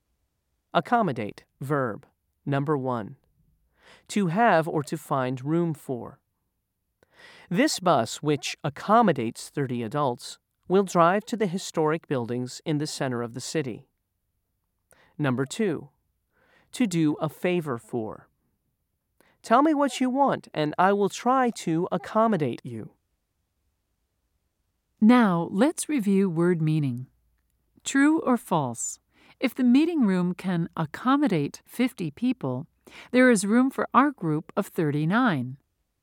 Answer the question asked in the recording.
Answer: If you said true, you are correct.